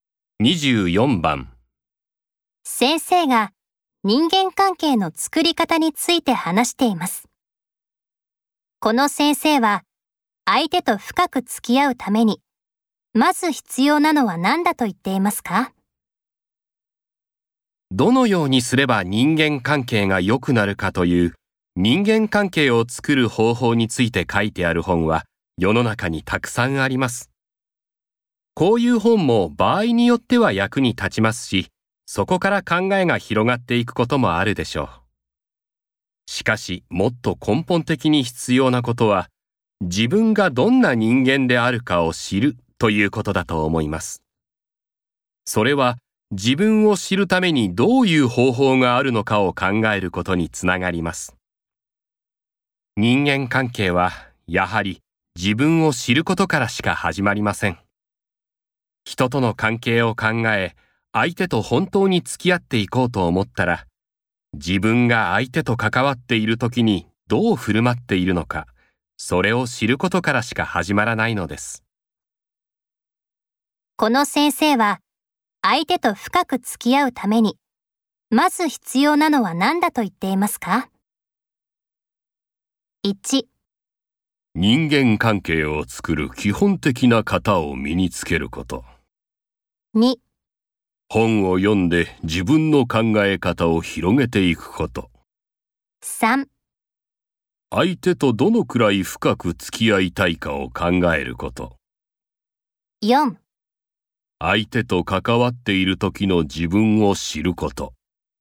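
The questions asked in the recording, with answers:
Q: この先生は、相手と深く付き合うために、まず必要なのは何だと言っていますか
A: 4: 相手と関わっている時の自分を知ること。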